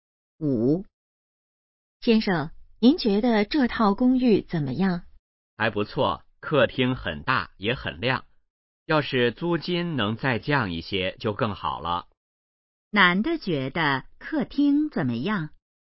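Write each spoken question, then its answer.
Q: 男的觉得客厅怎么样?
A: 很大,也很亮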